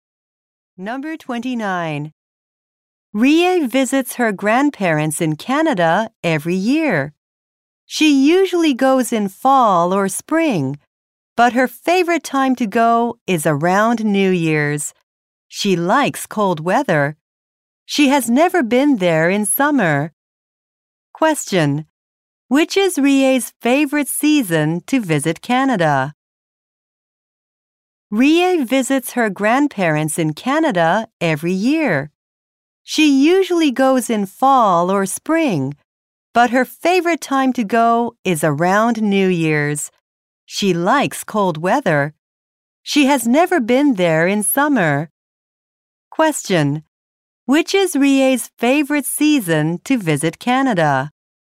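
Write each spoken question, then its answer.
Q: Question. Which is Rie's favorite season to visit Canada?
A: Winter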